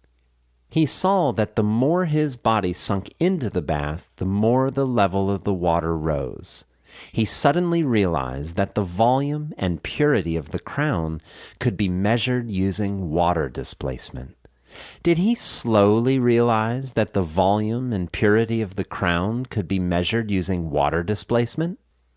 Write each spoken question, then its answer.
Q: Did he slowly realize that the volume and purity of the crown could be measured using water displacement?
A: No, he suddenly realized that the volume and purity of the crown could be measured using water displacement.